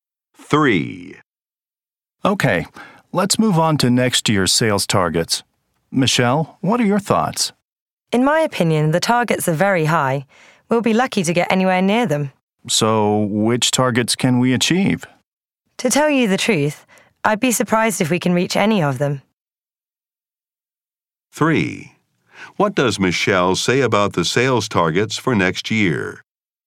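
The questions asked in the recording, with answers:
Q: What does Michelle say about the sales targets for next year?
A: They are too high; they probably won't reach any of them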